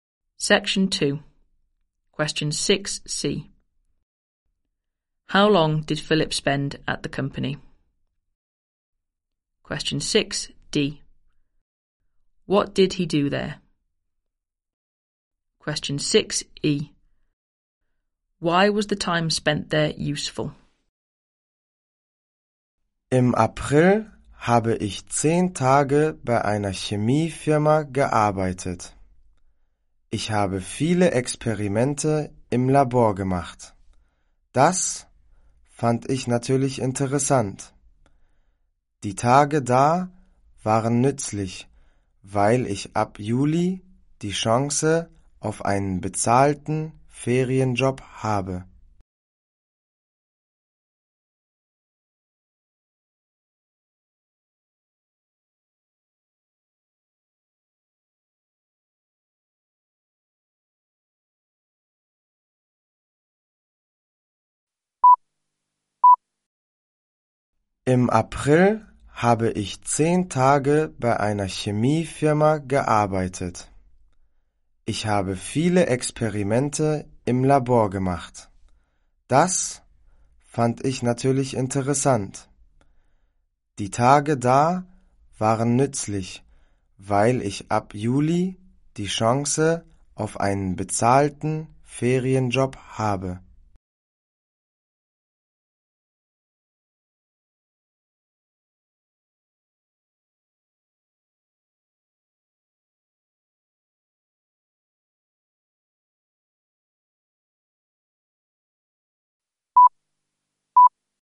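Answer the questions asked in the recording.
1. 10 days
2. Lots of experiments in the lab
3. He has the chance of a paid holiday job from July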